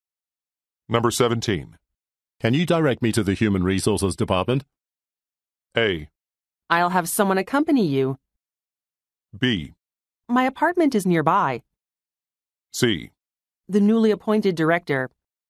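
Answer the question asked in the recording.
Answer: A: I'll have someone accompany you.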